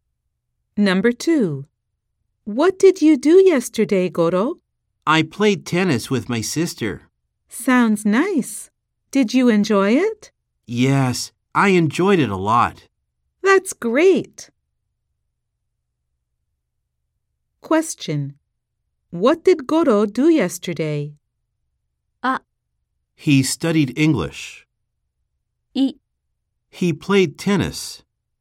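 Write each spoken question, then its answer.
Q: What did Goro do yesterday?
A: He played tennis.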